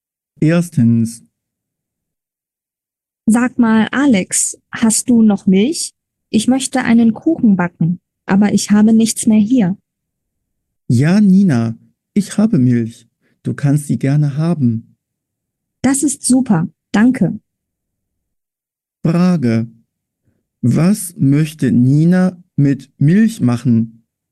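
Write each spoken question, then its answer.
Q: Was möchte Nina mit Milch machen?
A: einen Kuchen backen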